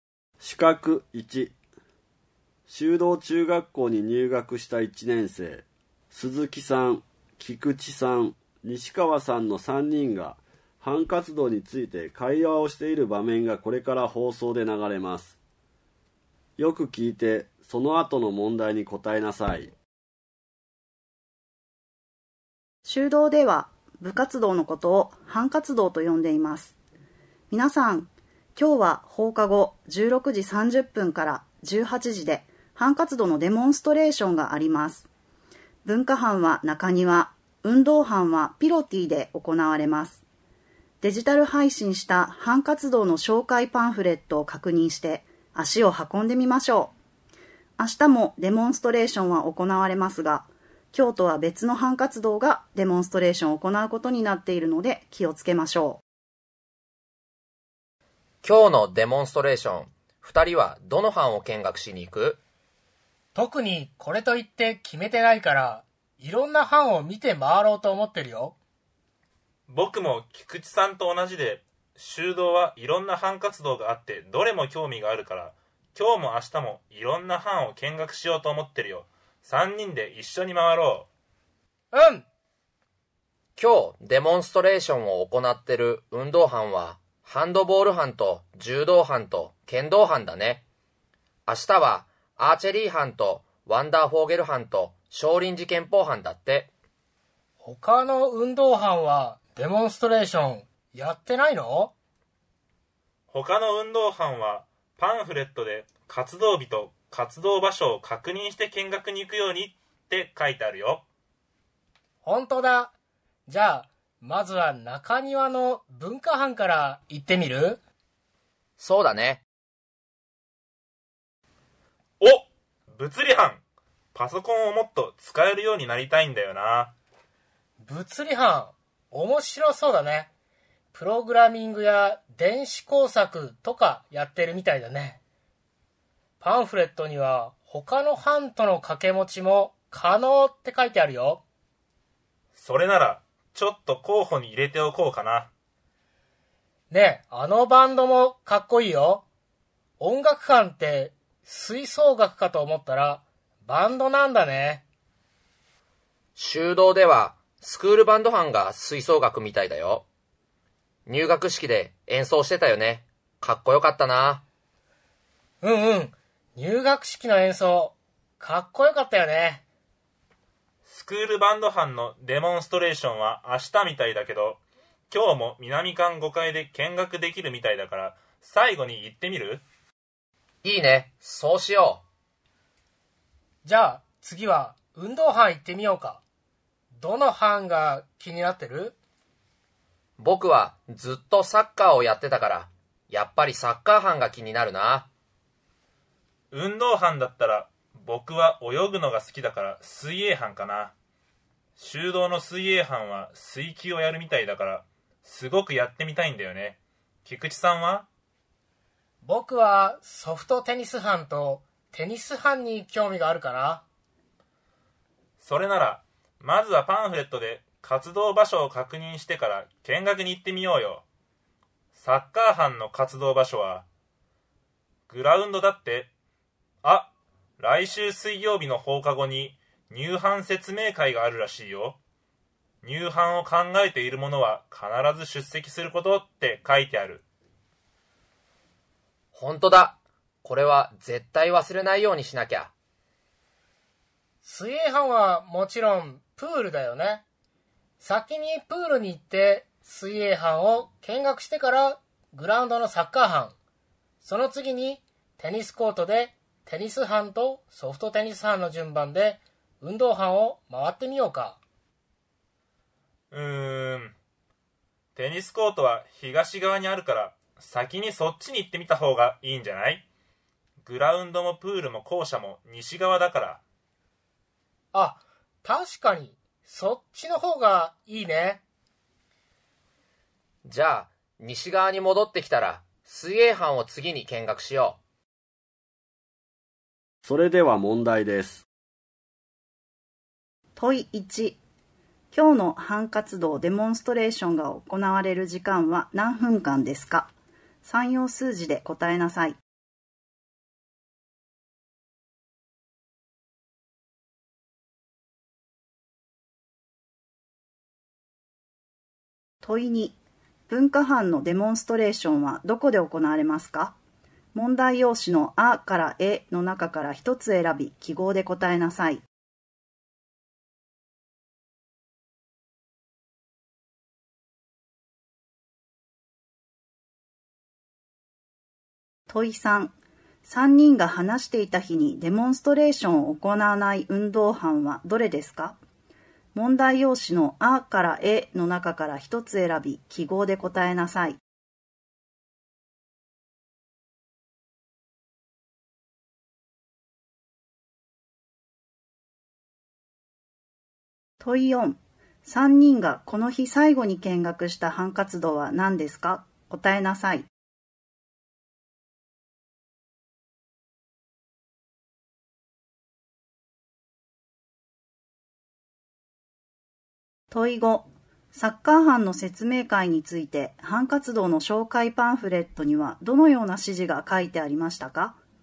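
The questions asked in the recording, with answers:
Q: 今日の班活動デモンストレーションが行われる時間は何分間ですか?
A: 90分間

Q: 3人がこの日最後に見学した班活動は何ですか?答えなさい。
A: スクールバンド班

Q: サッカー班の説明会について班活動の紹介パンフレットにはどのような指示が書いてありましたか?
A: 入班を考えている者は必ず出席すること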